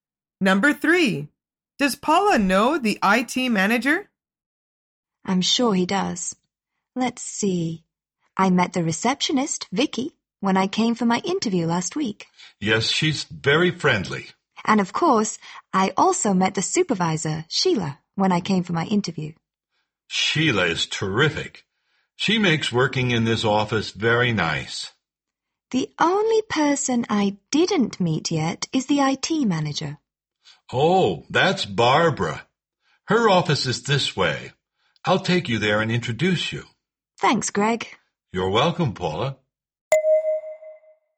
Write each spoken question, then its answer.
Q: Does Paula know the IT manager?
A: is no. They didn't meet yet.